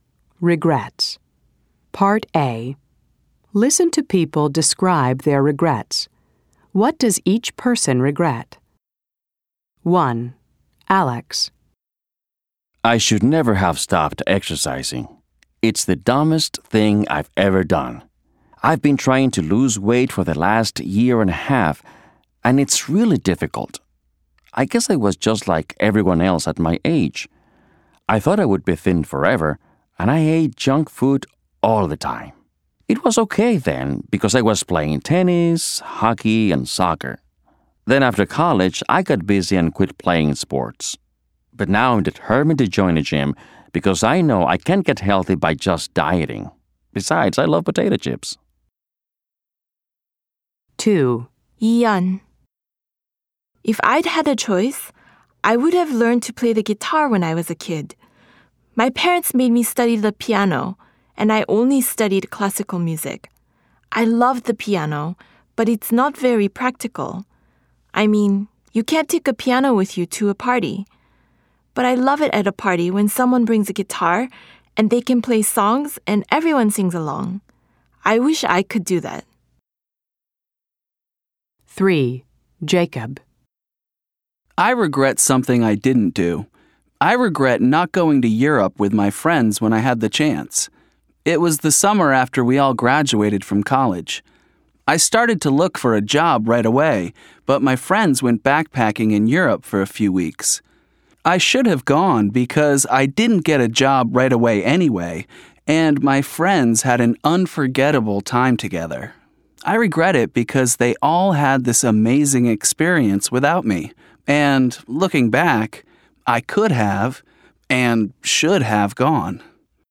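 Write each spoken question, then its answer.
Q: What does each person regret?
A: Alex regrets stopping exercising.

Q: What does each person regret?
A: Ian regrets not learning to play the guitar as a kid.

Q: What does each person regret?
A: Jacob regrets not going to Europe with his friends after college.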